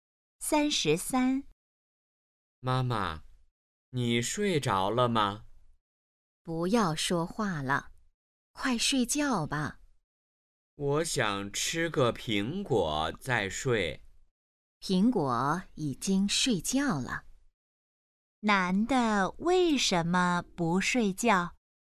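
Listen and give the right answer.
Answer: 他想吃个苹果再睡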